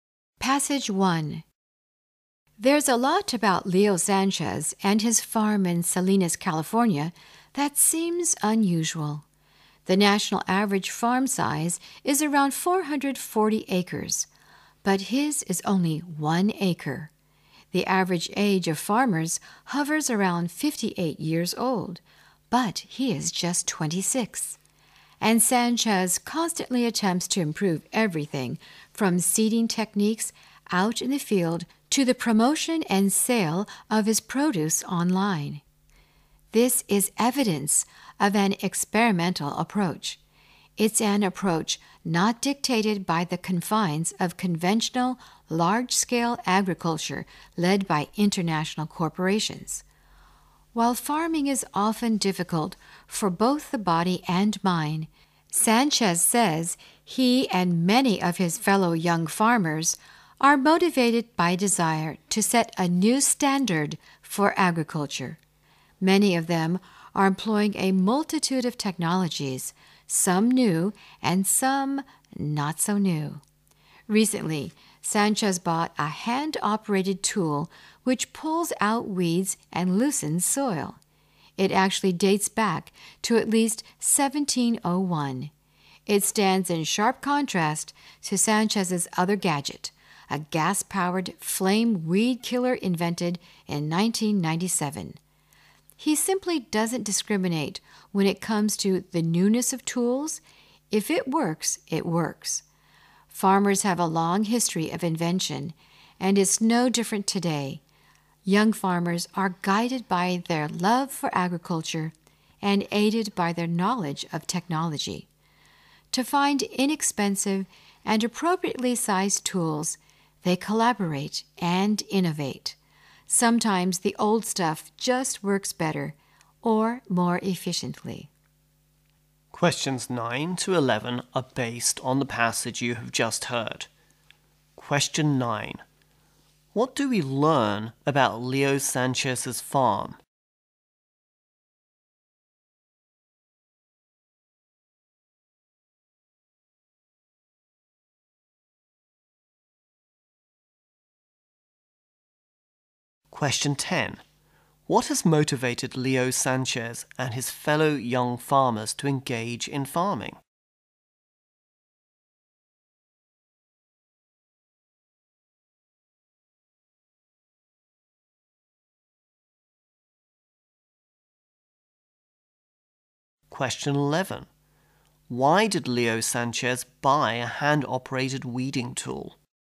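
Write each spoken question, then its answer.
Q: What do we learn about Leo Sanchez's farm?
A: It is only one acre.

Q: What has motivated Leo Sanchez and his fellow young farmers to engage in farming?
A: The desire to set a new standard for agriculture.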